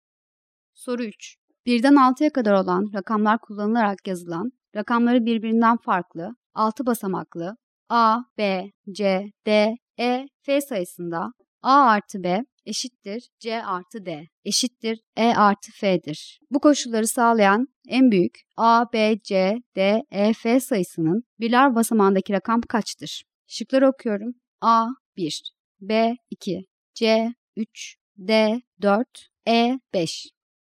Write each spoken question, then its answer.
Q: Bu koşulları sağlayan en büyük A, B, C, D, E, F sayısının birler basamağındaki rakam kaçtır?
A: Doğru cevap C şıkkı.